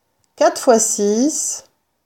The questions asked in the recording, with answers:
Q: 4 fois 6,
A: 4 fois 6 égale 24.